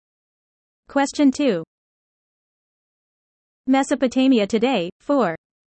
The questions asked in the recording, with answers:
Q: Mesopotamia today, 4.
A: The answer is Iraq.